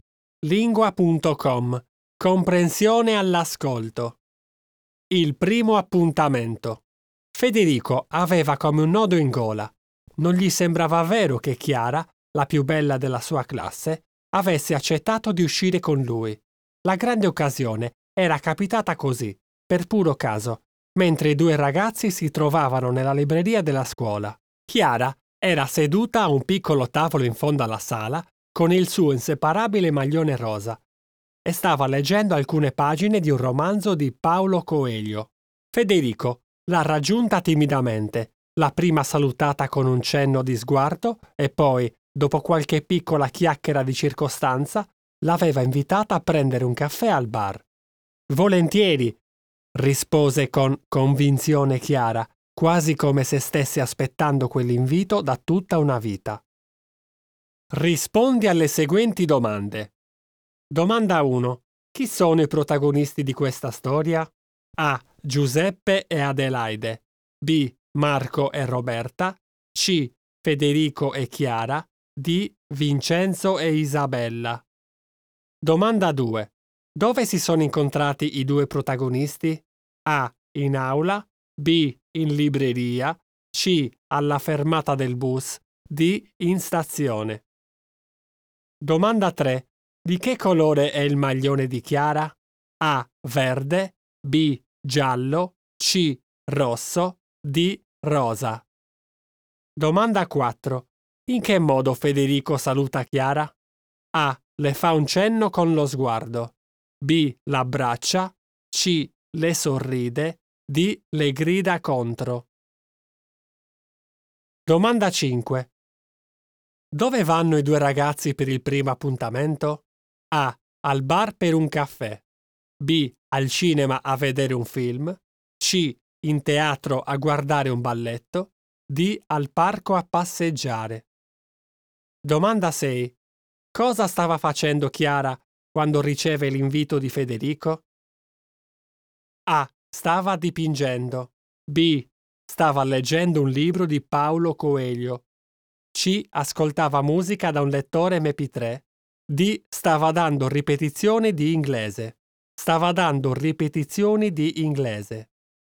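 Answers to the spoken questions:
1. C: Federico e Chiara
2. B: In libreria
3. D: Rosa
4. A: Le fa un cenno con lo sguardo
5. A: Al bar per un caffè
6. B: Stava leggendo un libro di Paolo Coelho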